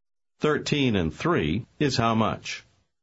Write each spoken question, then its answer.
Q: 13 and 3 is how much?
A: 16.